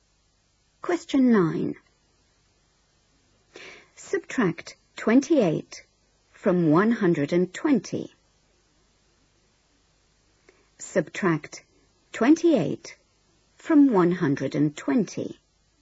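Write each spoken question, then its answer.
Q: Subtract 28 from 120.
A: 92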